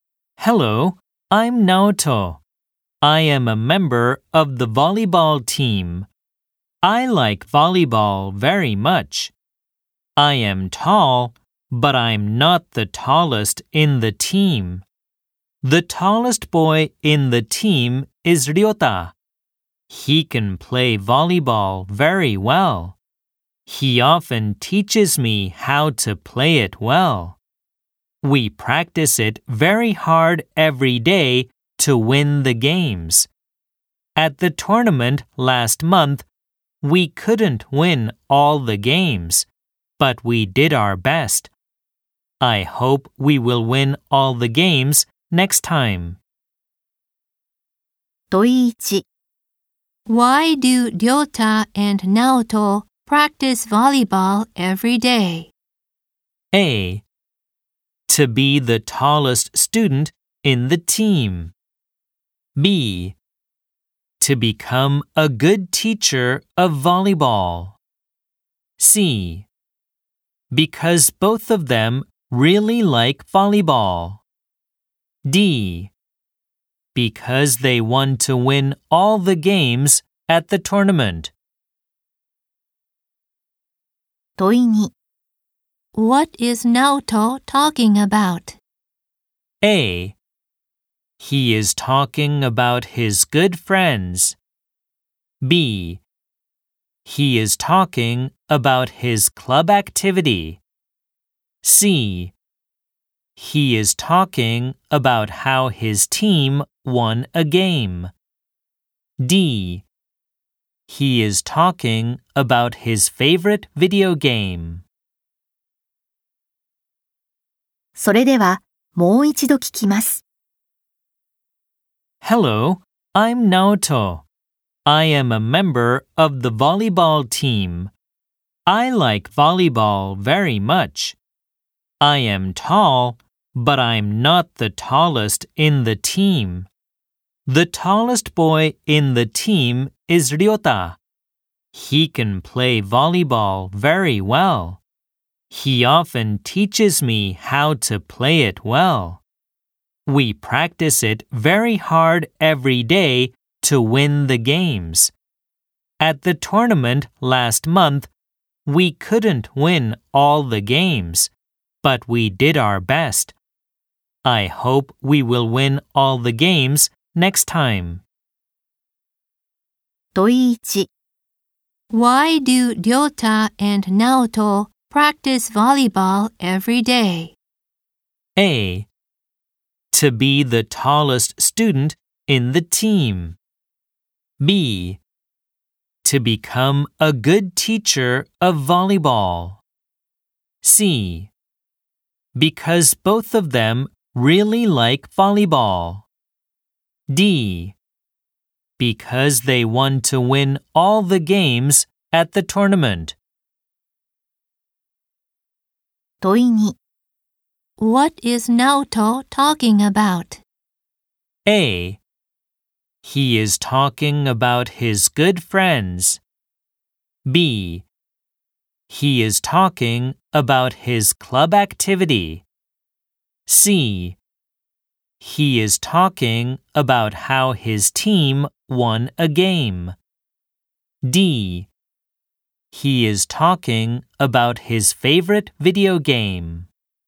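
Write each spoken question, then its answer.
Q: Why do Ryota and Naoto practice volleyball every day?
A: D: Because they want to win all the games at the tournament.

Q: What is Naoto talking about?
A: B: He is talking about his club activity.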